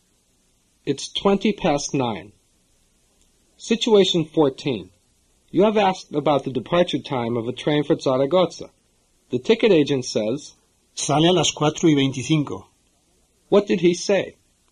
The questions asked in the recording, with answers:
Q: What did he say?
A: He said, it leaves at 4:25.